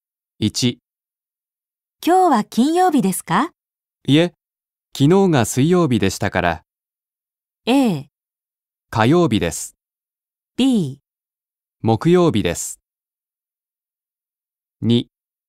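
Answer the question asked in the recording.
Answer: B: 木曜日です。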